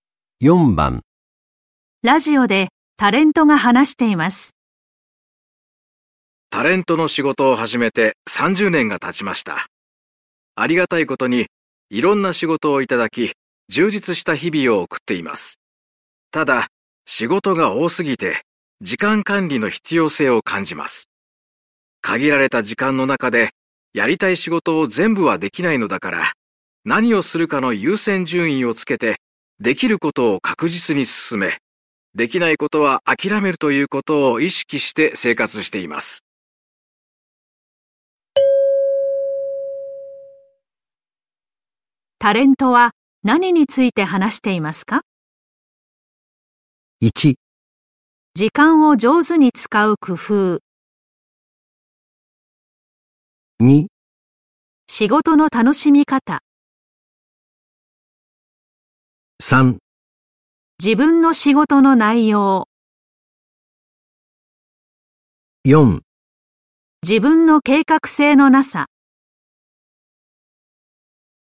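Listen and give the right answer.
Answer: 1: 時間を上手に使う工夫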